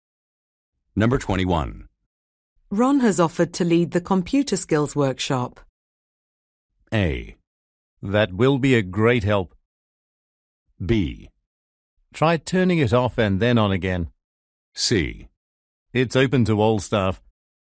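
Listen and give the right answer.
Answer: A: That will be a great help.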